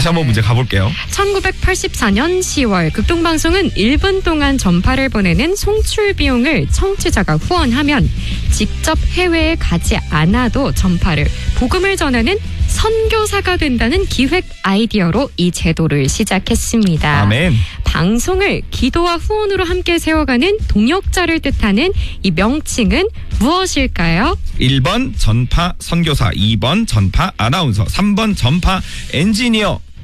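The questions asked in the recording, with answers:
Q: 방송을 기도와 후원으로 함께 세워가는 동역자를 뜻하는 이 명칭은 무엇일까요?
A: 1: 전파 선교사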